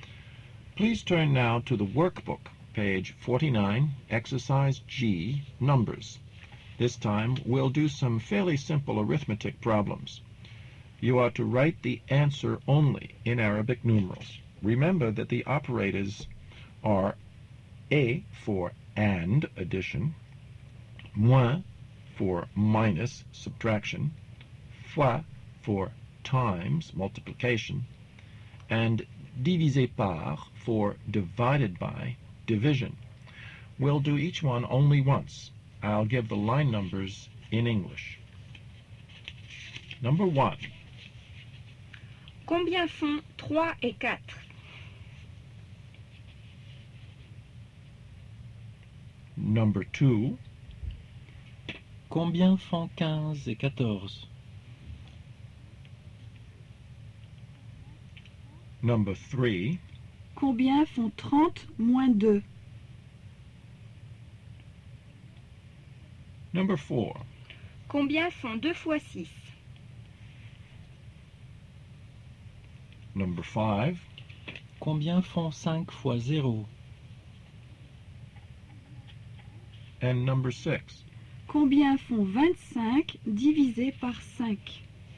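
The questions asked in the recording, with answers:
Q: Combien font 15 et 14?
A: 29

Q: Combien font 30 moins 2?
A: 28

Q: Combien font 2 fois 6?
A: 12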